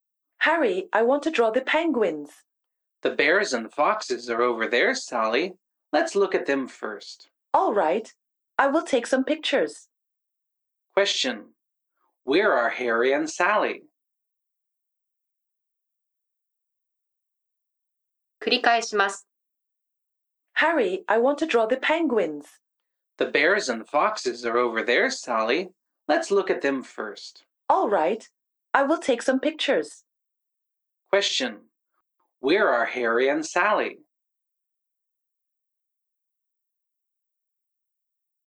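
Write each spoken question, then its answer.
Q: Where are Harry and Sally?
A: At the zoo.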